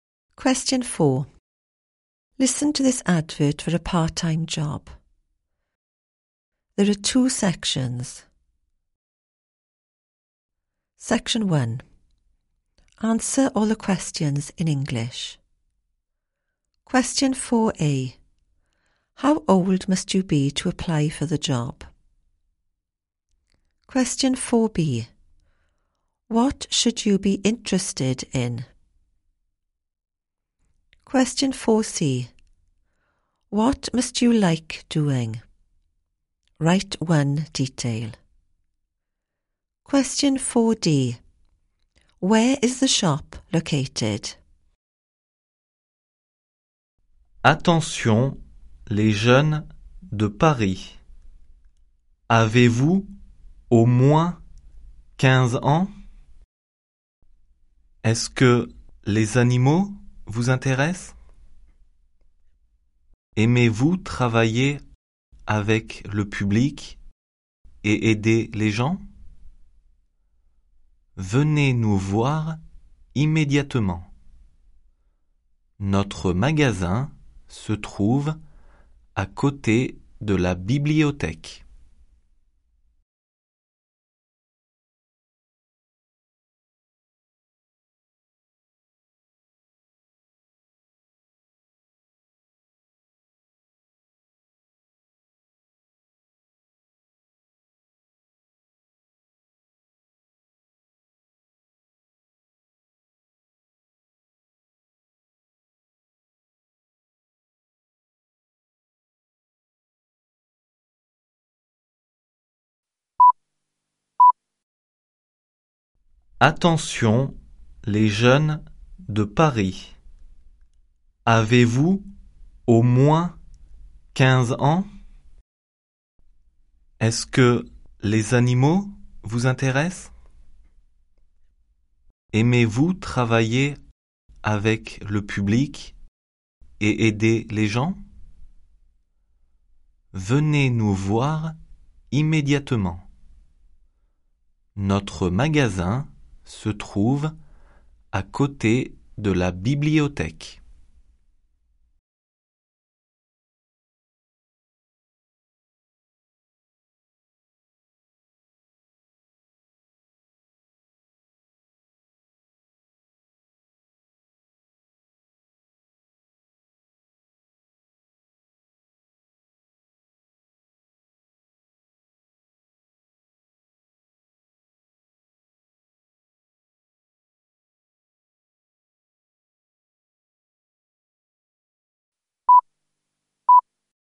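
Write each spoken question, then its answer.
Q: How old must you be to apply for the job?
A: At least 15

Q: What should you be interested in?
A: Animals

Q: What must you like doing?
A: Working with the public / helping people

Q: Where is the shop located?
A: Next to the library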